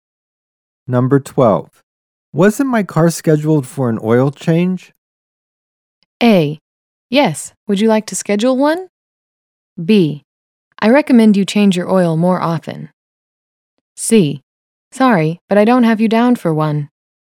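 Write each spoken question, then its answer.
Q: Wasn't my car scheduled for an oil change?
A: C: Sorry, but I don't have you down for one.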